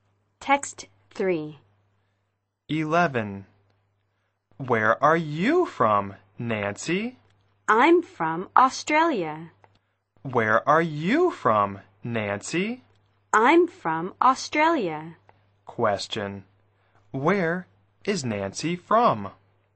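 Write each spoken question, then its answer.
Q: Where is Nancy from?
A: Australia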